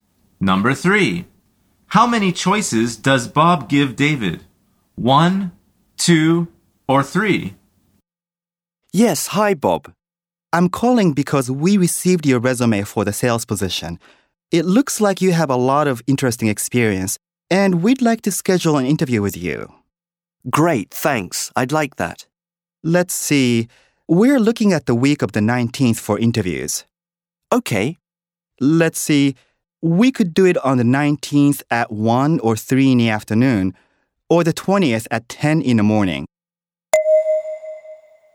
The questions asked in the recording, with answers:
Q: How many choices does Bob give David?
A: The answer is 3.